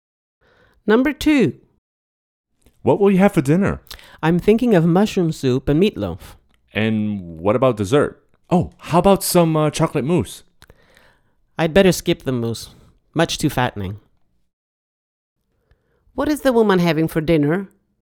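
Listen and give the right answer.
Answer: Mushroom soup and meatloaf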